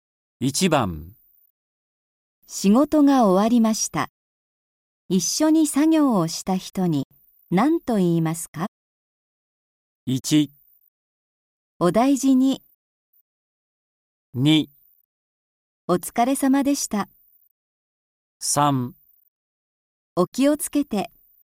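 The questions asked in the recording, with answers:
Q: 仕事が終わりました。一緒に作業をした人に何と言いますか?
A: 2: お疲れ様でした。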